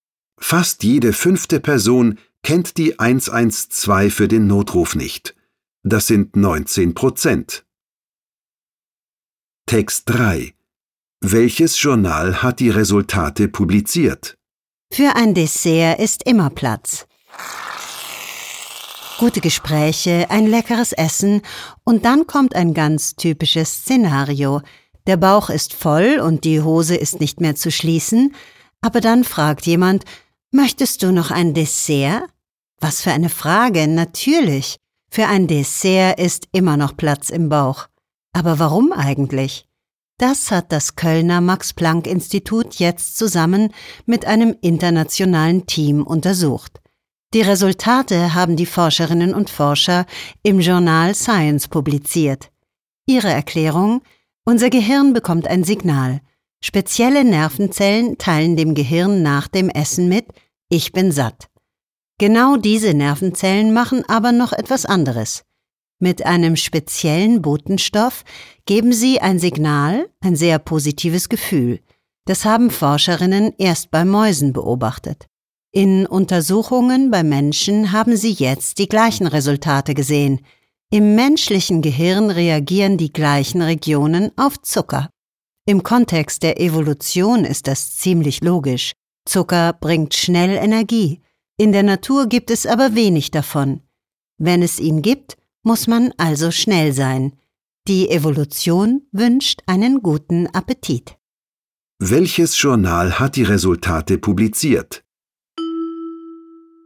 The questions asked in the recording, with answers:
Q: Welches Journal hat die Resultate publiziert?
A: Das Journal Science hat die Resultate publiziert.